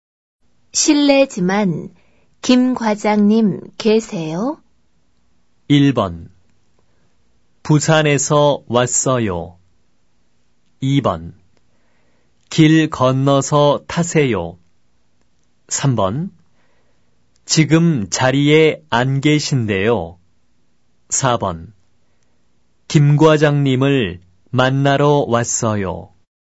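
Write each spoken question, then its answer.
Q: 실례지만 김 과장님 계세요?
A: 3: 지금 자리에 안 계신데요.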